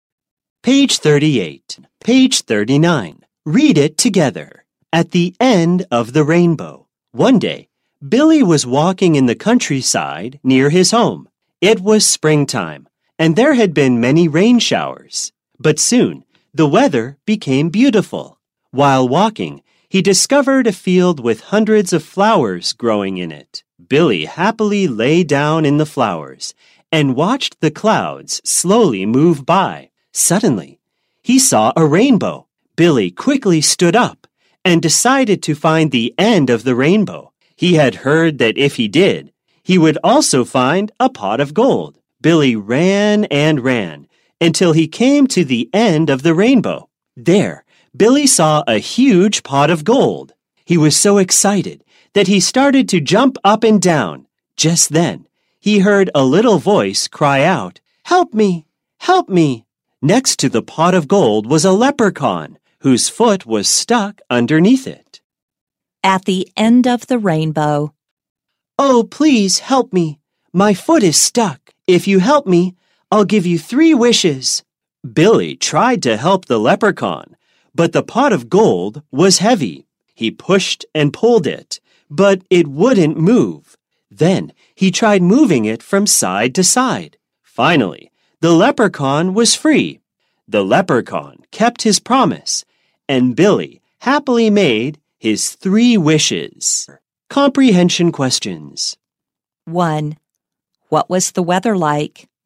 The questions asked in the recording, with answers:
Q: What was the weather like?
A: It was beautiful.